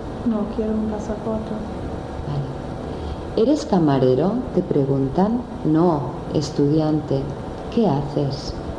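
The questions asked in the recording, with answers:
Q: ¿Qué haces?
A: Soy estudiante.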